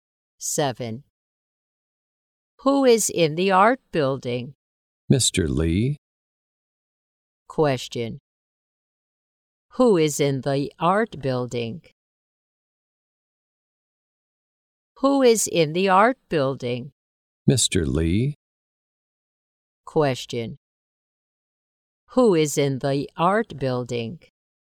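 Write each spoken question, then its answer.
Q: Who is in the art building?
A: Mr. Lee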